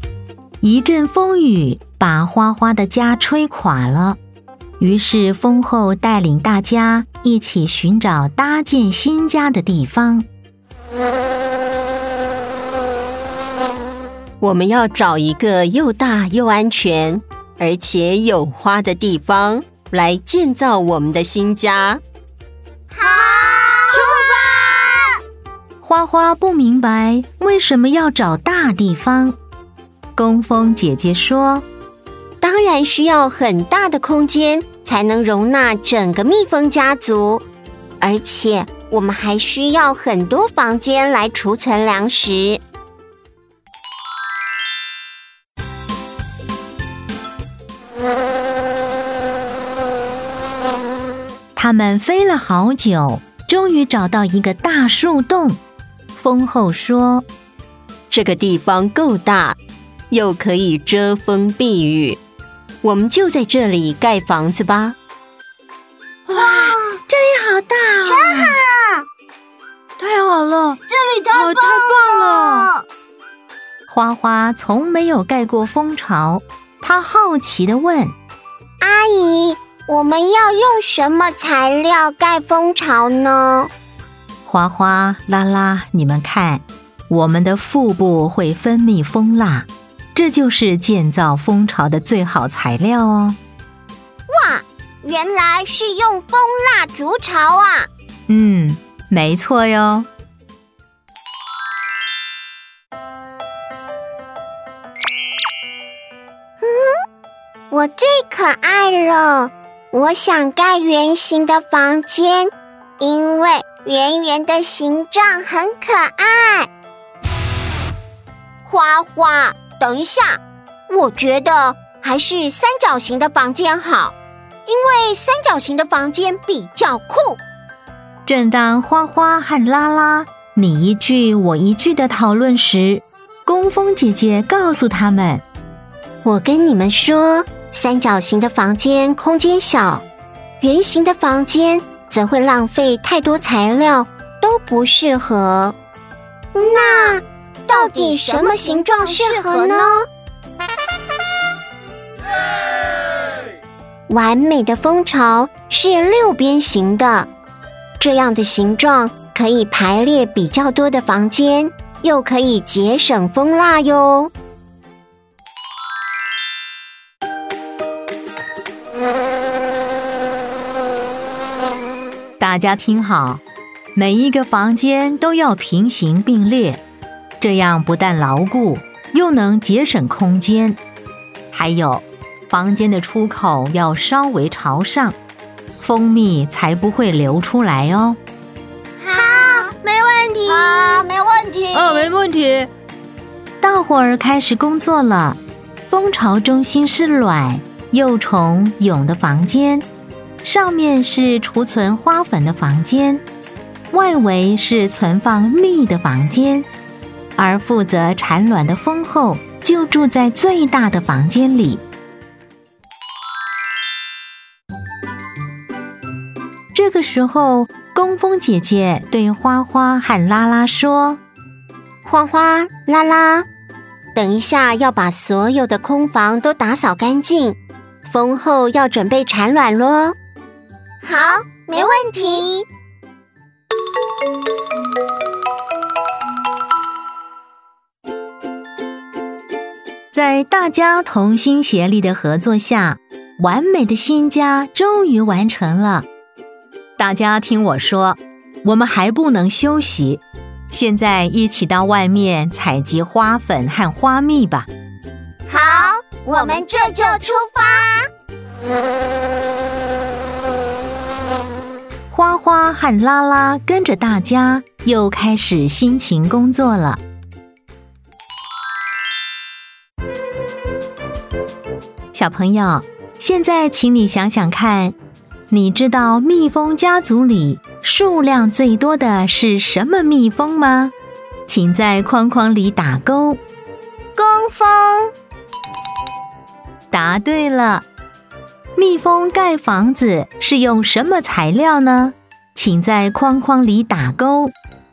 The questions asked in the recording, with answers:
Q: 蜜蜂盖房子是用什么材料呢?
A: 蜂蜡。